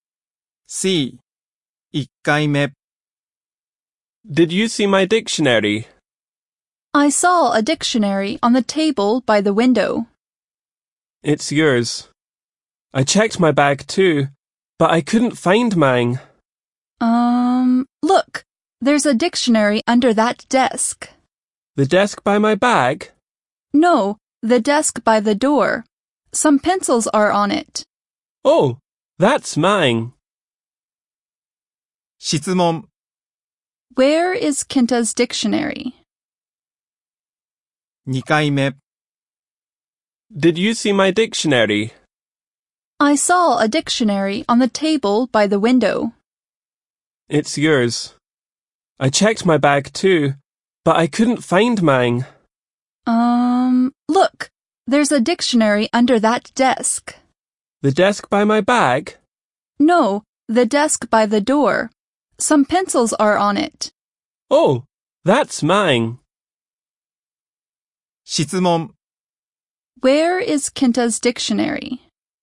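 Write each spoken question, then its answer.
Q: Where is Kenta's dictionary?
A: Under the desk by the door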